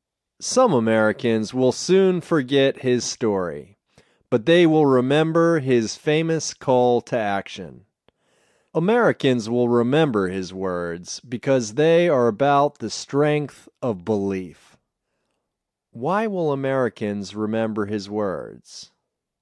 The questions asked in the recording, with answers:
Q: Why will Americans remember his words?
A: They will remember his words because they are about the strength of belief.